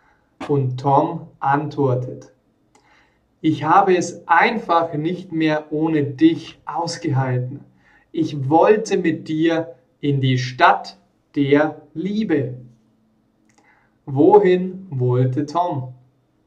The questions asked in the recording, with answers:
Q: Wohin wollte Tom?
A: Er wollte in die Stadt der Liebe.